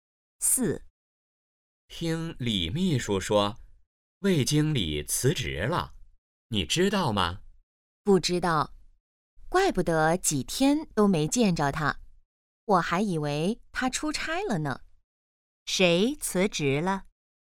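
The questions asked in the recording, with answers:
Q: 谁辞职了?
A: 魏经理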